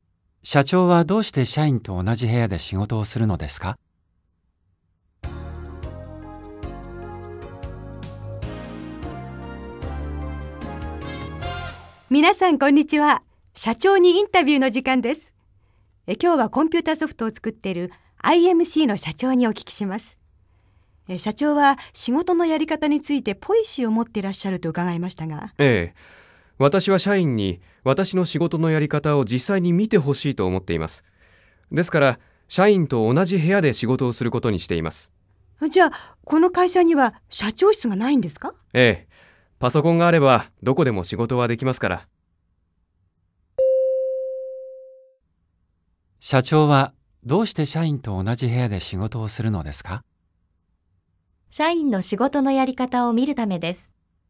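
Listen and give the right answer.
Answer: ×(社員に社長の仕事のやり方を見てほしいから)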